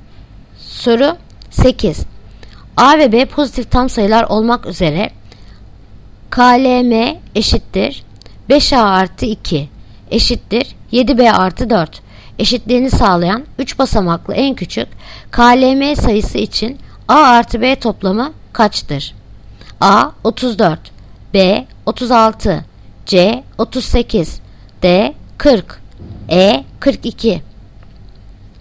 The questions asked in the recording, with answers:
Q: A ve B pozitif tam sayılar olmak üzere KLM eşittir 5A artı 2 eşittir 7B artı 4 eşitliğini sağlayan 3 basamaklı en küçük KLM sayısı için A artı B toplamı kaçtır?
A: Yanıt Adana 34.